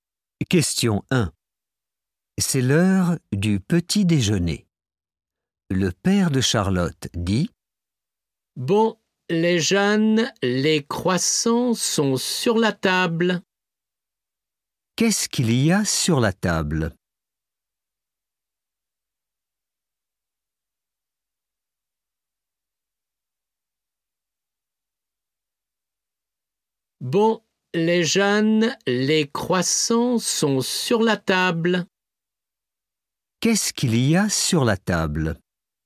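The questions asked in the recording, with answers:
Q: Qu'est-ce qu'il y a sur la table?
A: Des croissants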